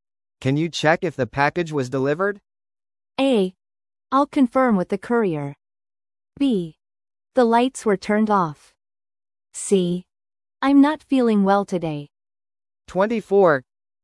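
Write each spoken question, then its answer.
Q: Can you check if the package was delivered?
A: A: I'll confirm with the courier.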